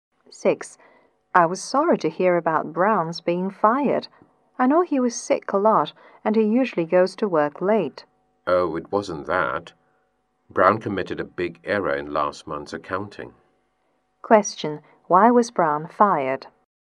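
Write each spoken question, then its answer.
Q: Why was Brown fired?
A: He made a big error in last month's accounting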